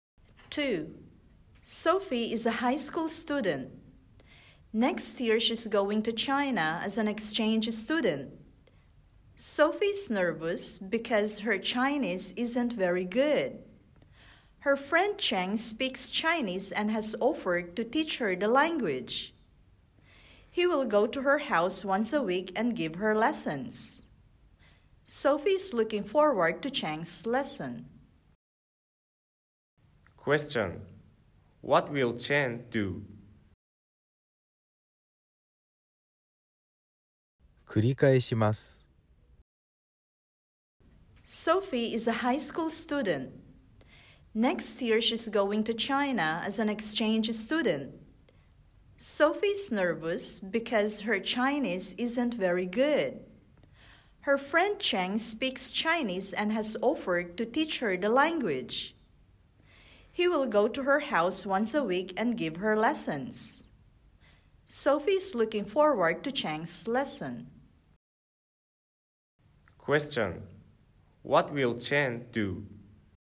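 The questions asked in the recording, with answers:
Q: Question: What will Cheng do?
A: Go to Sophie's house once a week and teach her Chinese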